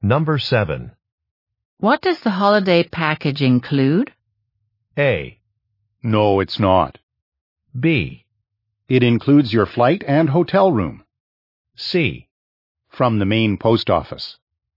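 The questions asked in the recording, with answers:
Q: What does the holiday package include?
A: B: It includes your flight and hotel room.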